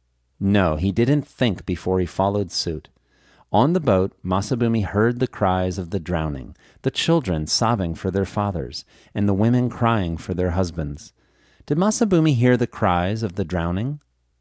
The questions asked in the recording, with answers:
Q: Did Masabumi hear the cries of the drowning?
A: Yes, Masabumi heard the cries of the drowning.